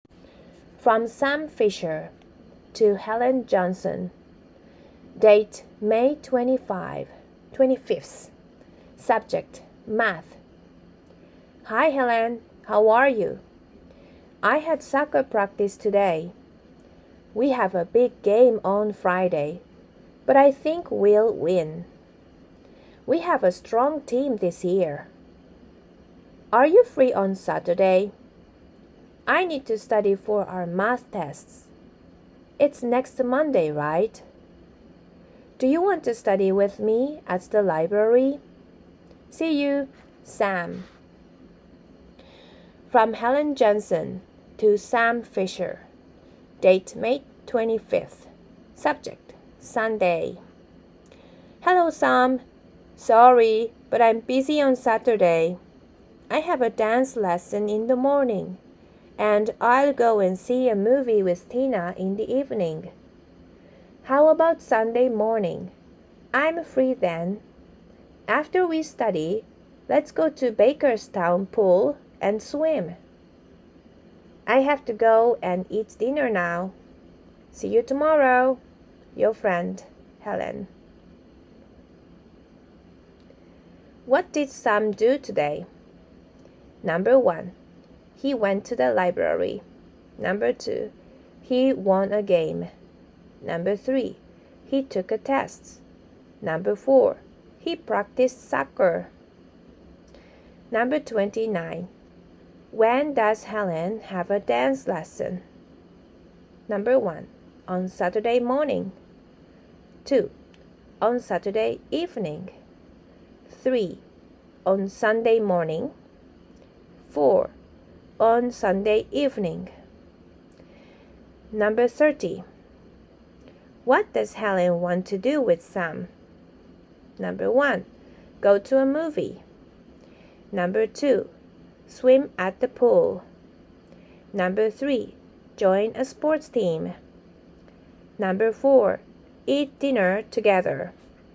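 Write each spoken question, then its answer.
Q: What did Sam do today?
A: 4: He practiced soccer.

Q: When does Helen have a dance lesson?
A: 1: On Saturday morning.

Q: What does Helen want to do with Sam?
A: 2: Swim at the pool.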